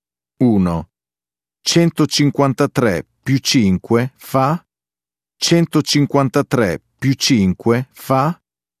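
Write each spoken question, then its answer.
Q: 153 più 5 fa?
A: 158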